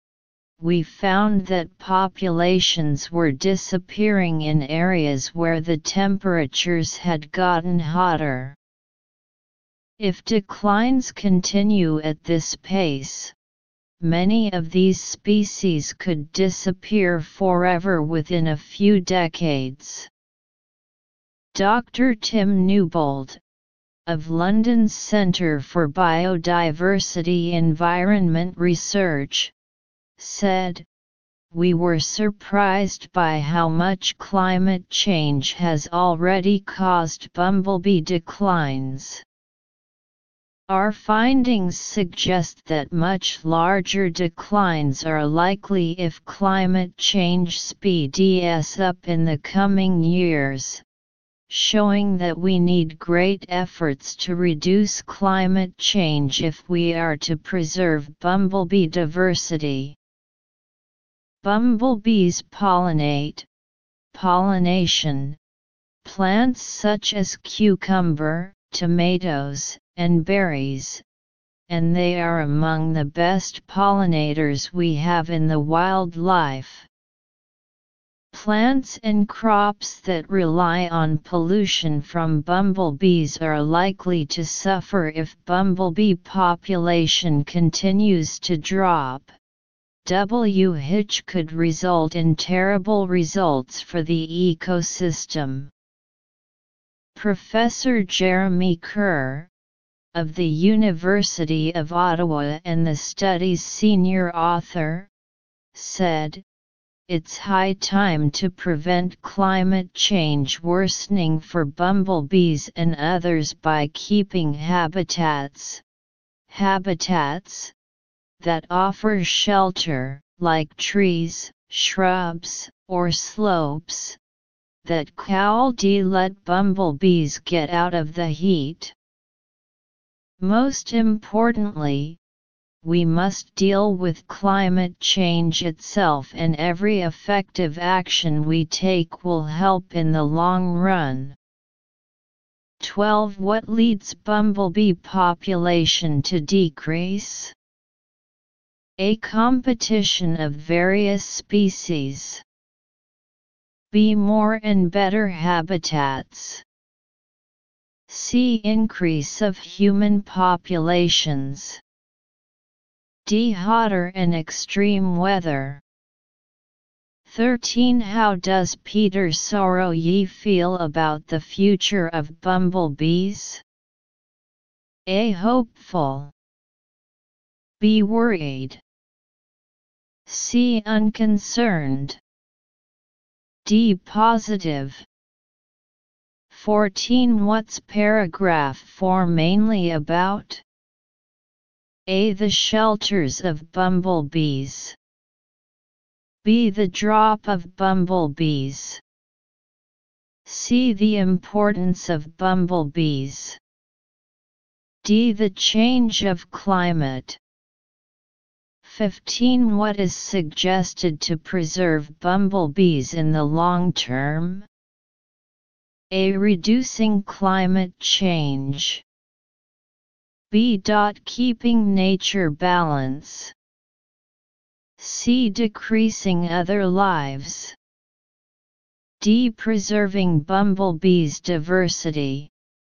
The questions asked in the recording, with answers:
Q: What is suggested to preserve bumblebees in the long term?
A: 15 A